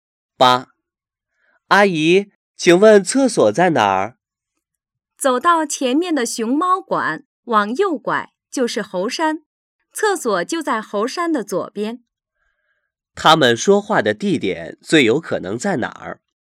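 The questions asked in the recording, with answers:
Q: 他们说话的地点最有可能在哪儿?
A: 动物园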